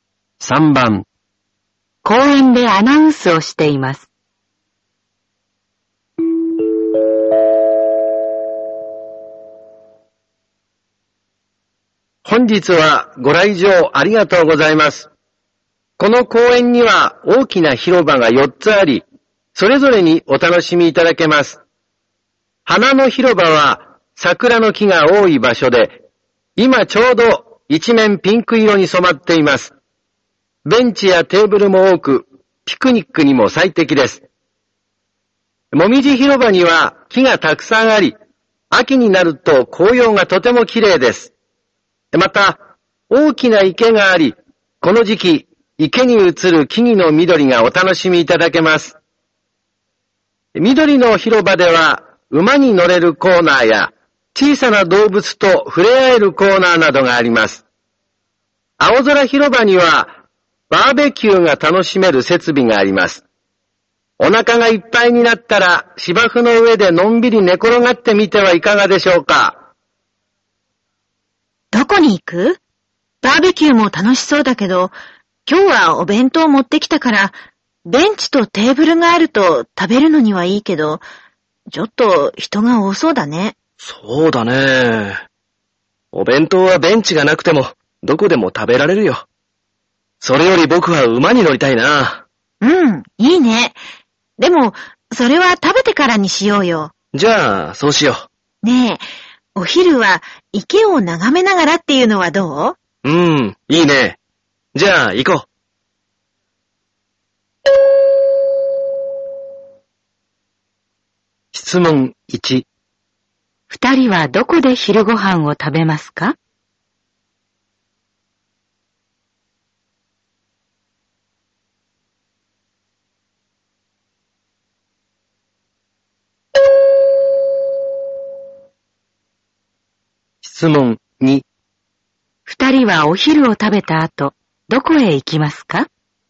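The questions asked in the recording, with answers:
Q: 二人はどこで昼ご飯を食べますか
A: もみじ広場

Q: 人はお昼を食べた後、どこへ行きますか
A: 緑の広場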